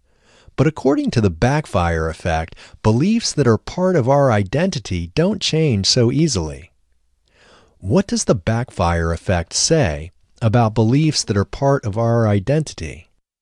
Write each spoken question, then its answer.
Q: What does the backfire effect say about beliefs that are part of our identity?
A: According to the backfire effect, beliefs that are part of our identity don't change easily.